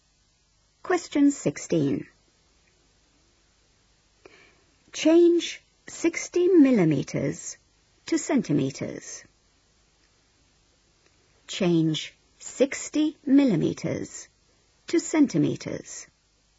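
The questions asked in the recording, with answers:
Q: Change 60 millimeters to centimeters.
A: 6 cm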